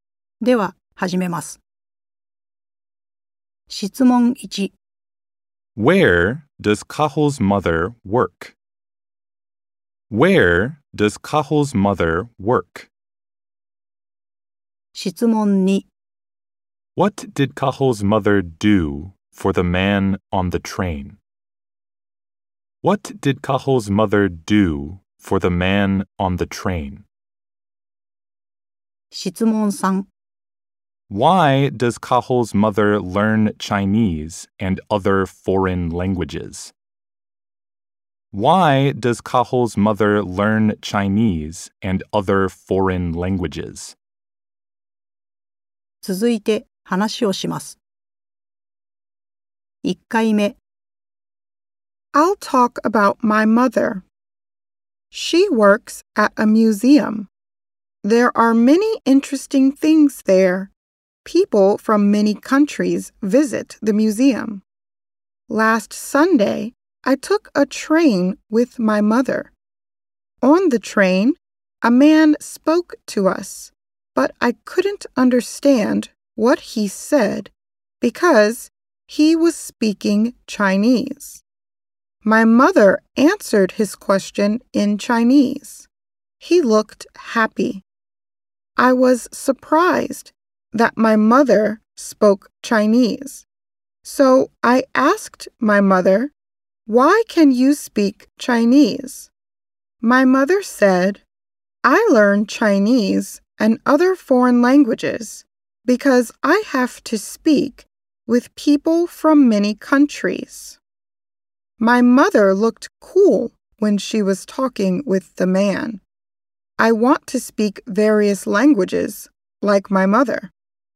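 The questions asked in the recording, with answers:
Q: Where does Cahill's mother work?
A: At a museum

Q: What did Cahill's mother do for the man on the train?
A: She answered his question in Chinese

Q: Why does Cahill's mother learn Chinese and other foreign languages?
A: Because she has to speak with people from many countries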